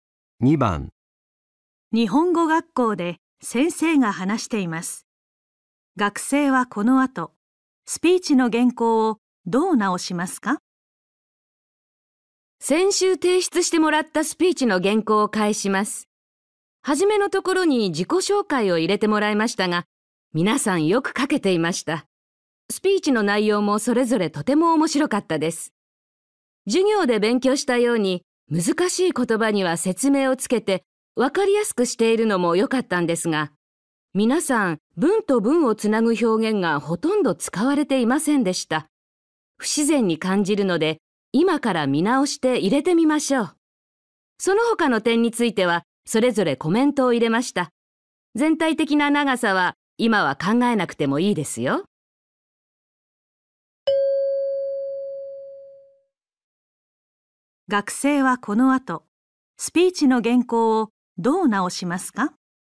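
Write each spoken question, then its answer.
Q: 学生はこの後、スピーチの原稿をどう直しますか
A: 文と文をつなぐ表現を入れる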